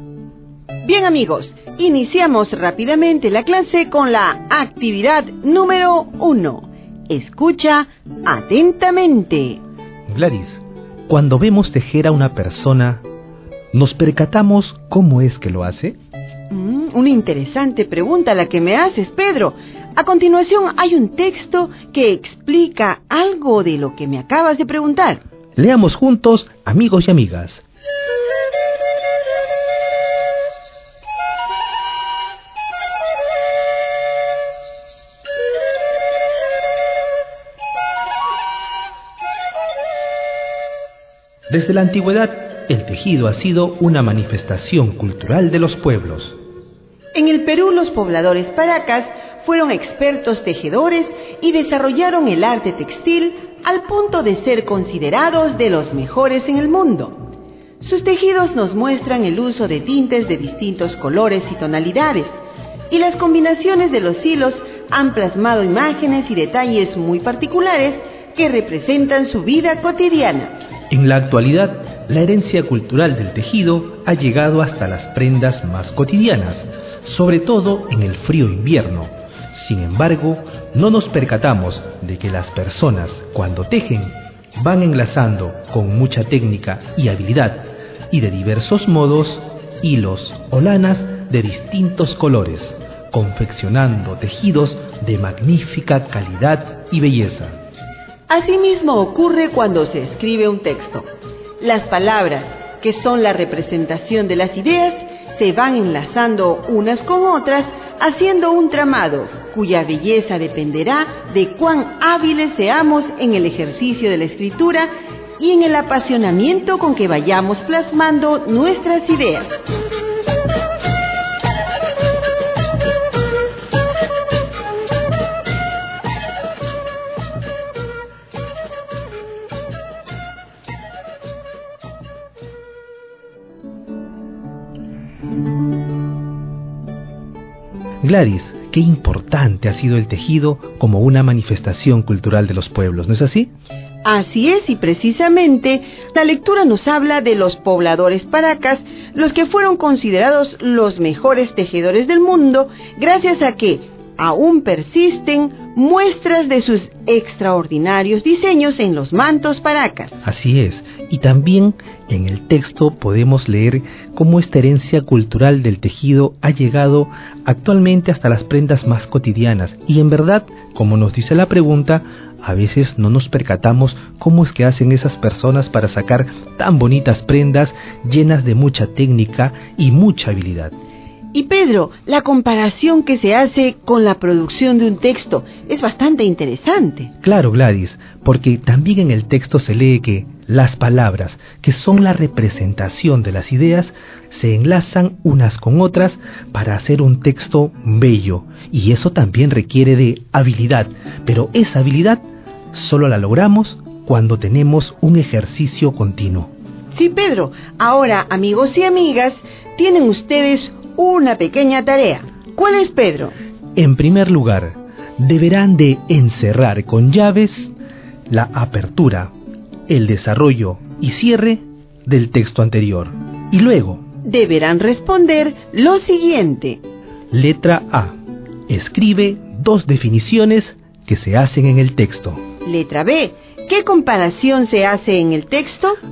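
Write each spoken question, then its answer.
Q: ¿Qué comparación se hace en el texto?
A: Se compara el tejer (enlazar hilos con técnica y habilidad) con escribir un texto (enlazar palabras que representan ideas)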